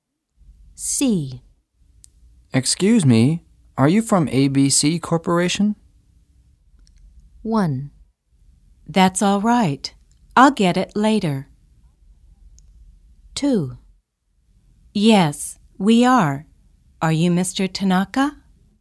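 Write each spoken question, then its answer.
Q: Excuse me, are you from ABC Corporation?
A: 2: Yes, we are. Are you Mr. Tanaka?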